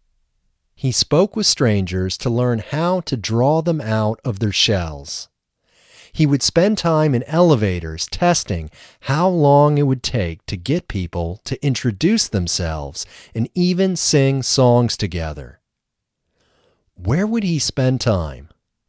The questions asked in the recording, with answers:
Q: Where would he spend time?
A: He would spend time in elevators.